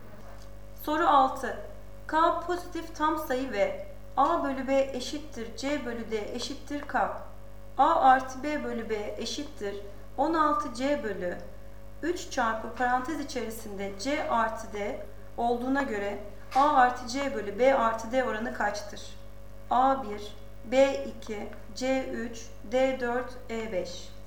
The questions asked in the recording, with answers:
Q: A artı B bölü B eşittir 16 C bölü 3 çarpı parantez içerisinde C artı D olduğuna göre A artı C bölü B artı D oranı kaçtır?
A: Doğru cevap C 3.